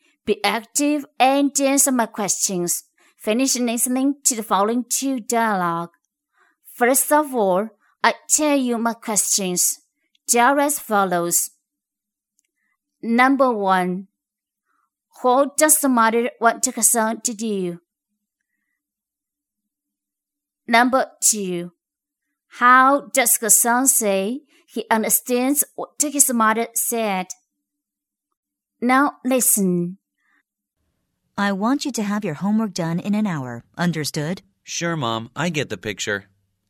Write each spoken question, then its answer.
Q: what does the mother want her son to do?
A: the mother wants her son to get his homework done in 1 hour.